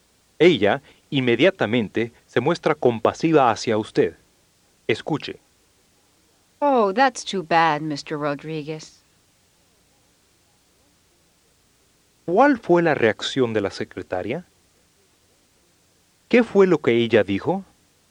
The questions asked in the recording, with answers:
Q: ¿Qué fue lo que ella dijo?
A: Oh, that's too bad, Mr. Rodriguez.